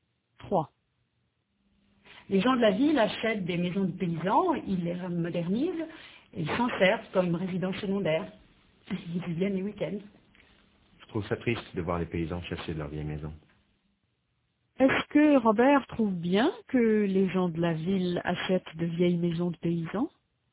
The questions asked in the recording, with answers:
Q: Est-ce que Robert trouve bien que les gens de la ville achètent de vieilles maisons de paysans?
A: Non, il trouve ça triste.